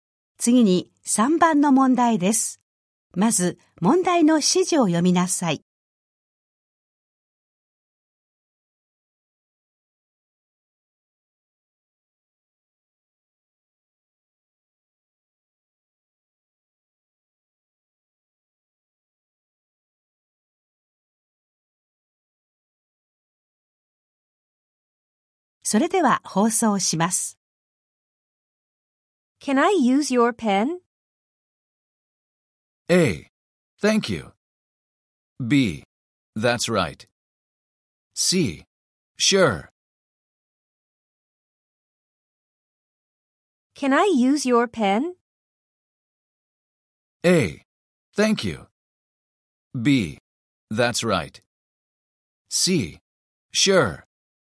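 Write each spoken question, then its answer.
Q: Can I use your pen?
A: C: Sure.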